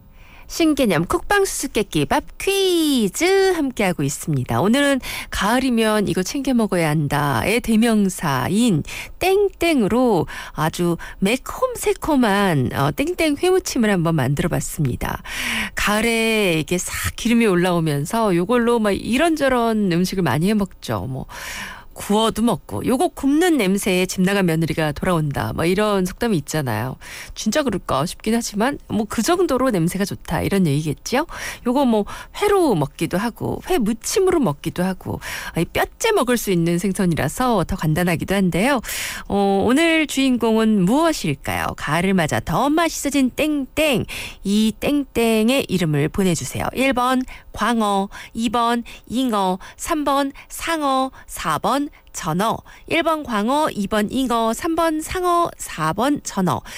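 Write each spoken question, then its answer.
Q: 오늘 주인공은 무엇일까요? 가을을 맞아 더 맛있어진 땡땡.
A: 4: 전어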